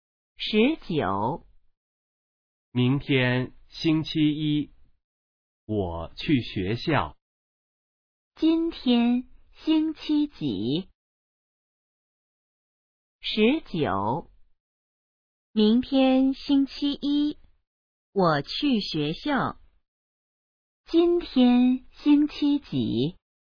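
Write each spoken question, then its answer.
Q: 今天星期几?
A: 星期日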